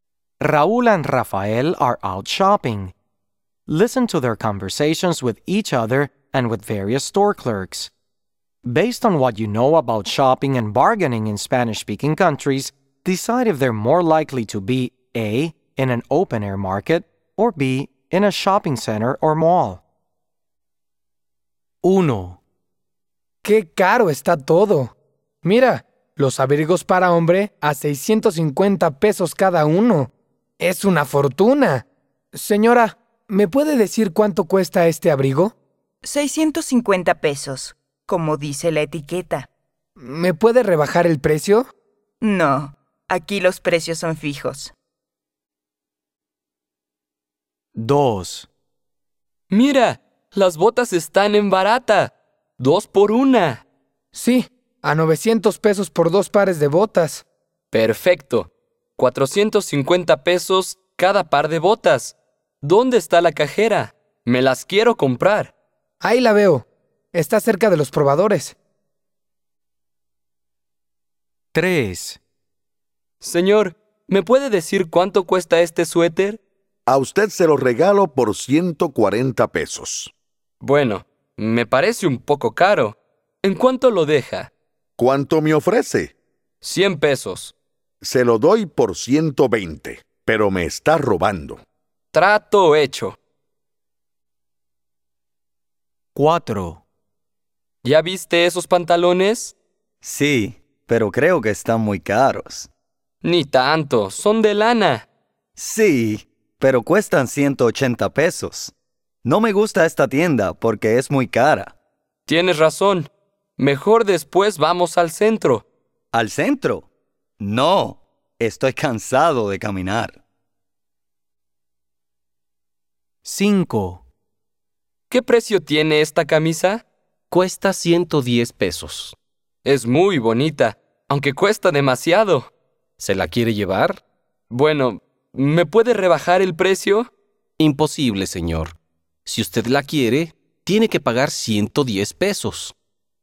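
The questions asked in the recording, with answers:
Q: Based on what you know about shopping and bargaining in Spanish-speaking countries, decide if they're more likely to be A.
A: B: in a shopping center or mall

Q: Based on what you know about shopping and bargaining in Spanish-speaking countries, decide if they're more likely to be A.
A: B: in a shopping center or mall

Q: Based on what you know about shopping and bargaining in Spanish-speaking countries, decide if they're more likely to be A.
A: A: in an open-air market

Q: Based on what you know about shopping and bargaining in Spanish-speaking countries, decide if they're more likely to be A.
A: B: in a shopping center or mall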